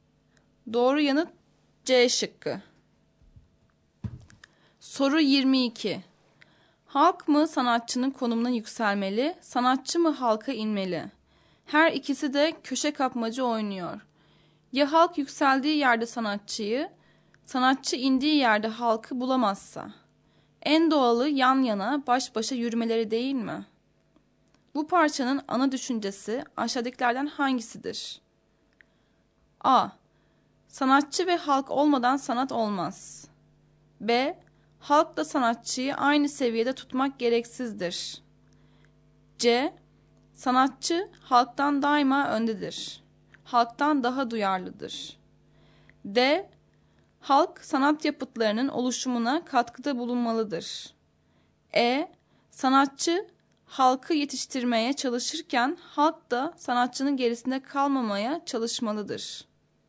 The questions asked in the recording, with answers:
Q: Bu parçanın ana düşüncesi aşağıdakilerden hangisidir?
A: Doğru yanıt E şıkkı.